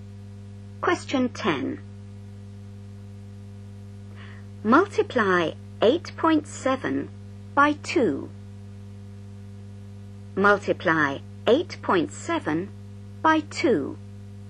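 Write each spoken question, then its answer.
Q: Multiply 8.7 by 2.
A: 17.4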